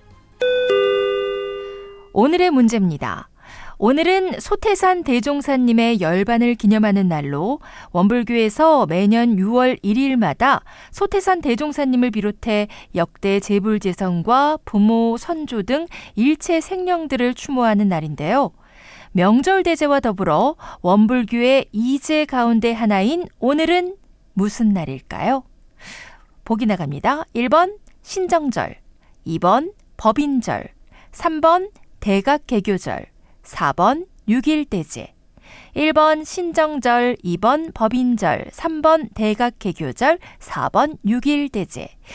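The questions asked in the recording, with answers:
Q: 명절대제와 더불어 원불교의 이제 가운데 하나인 오늘은 무슨 날일까요?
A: 4: 6.1대제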